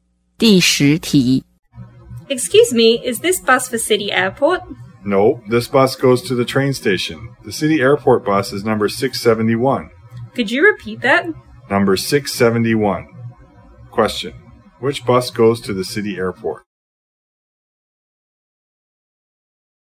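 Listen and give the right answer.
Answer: Number 671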